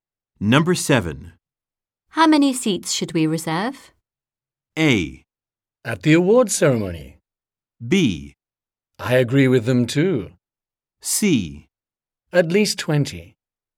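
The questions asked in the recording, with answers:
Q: How many seats should we reserve?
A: C: At least 20.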